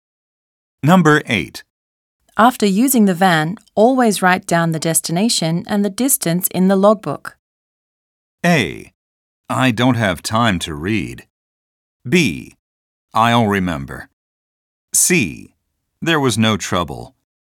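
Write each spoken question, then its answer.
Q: After using the van, always write down the destination and the distance in the logbook.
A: B: I'll remember.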